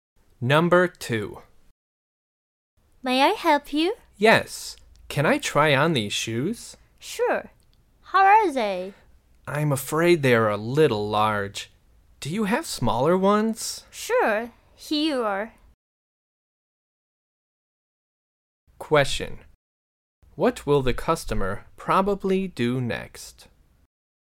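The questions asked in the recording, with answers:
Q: What will the customer probably do next?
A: Try on smaller shoes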